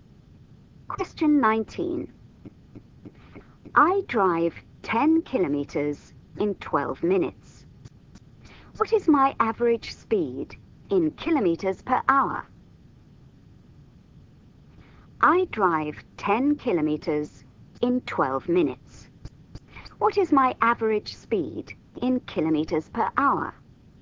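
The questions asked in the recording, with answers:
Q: What is my average speed in kilometers per hour?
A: 50 km/h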